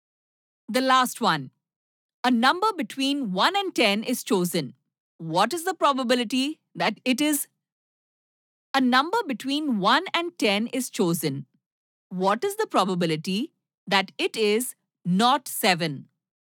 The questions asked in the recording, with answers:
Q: What is the probability that it is not 7?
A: Exactly. There are 9 other numbers, so 9 by 10.